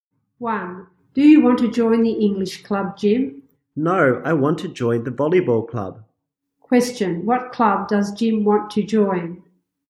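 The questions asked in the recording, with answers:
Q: What club does Jim want to join?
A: The volleyball club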